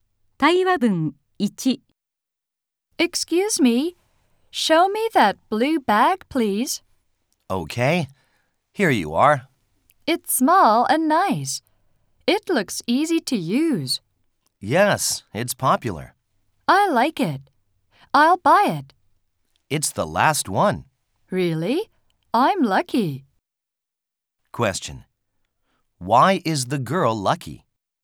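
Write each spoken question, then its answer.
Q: Why is the girl lucky?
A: Because she can buy the last blue bag.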